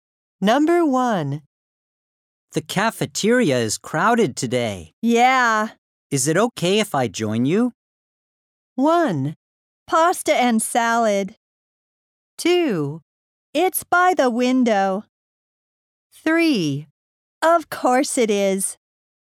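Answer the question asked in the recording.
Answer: 3: Of course it is.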